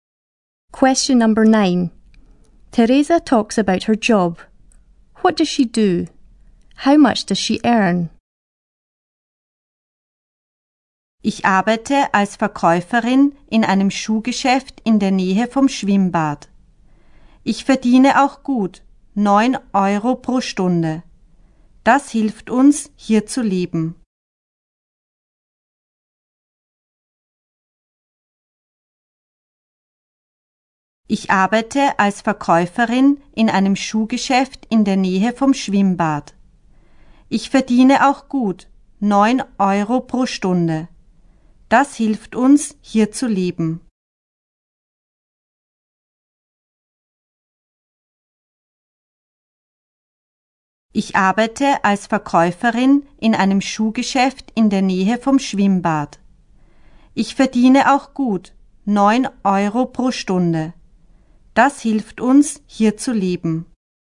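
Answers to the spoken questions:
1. Sales assistant in a shoe shop
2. 9 euros an hour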